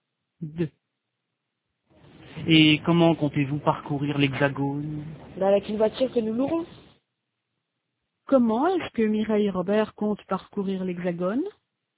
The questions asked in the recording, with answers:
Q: Comment est-ce que Mireille et Robert comptent parcourir l'Hexagone?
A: Avec une voiture qu'ils loueront.